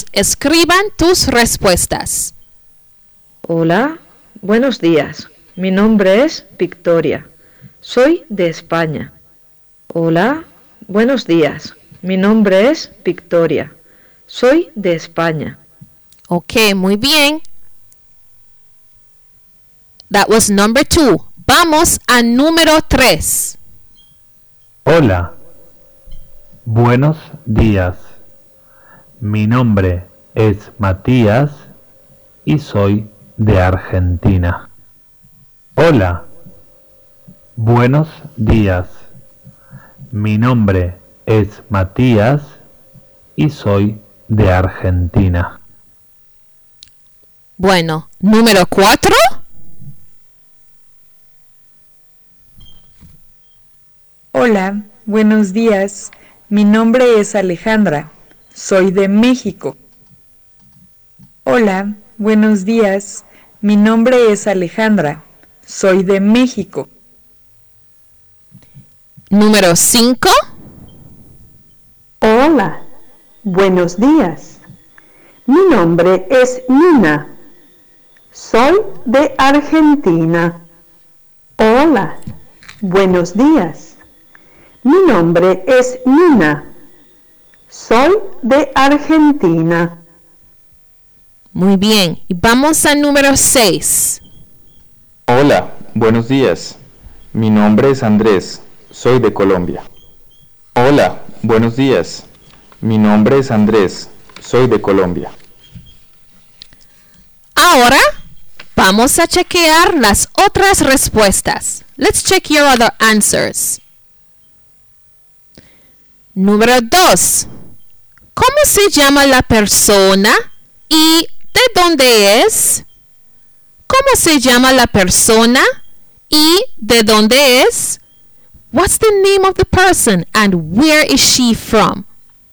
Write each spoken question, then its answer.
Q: ¿Cómo se llama la persona y de dónde es?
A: Se llama Victoria. Victoria es de España.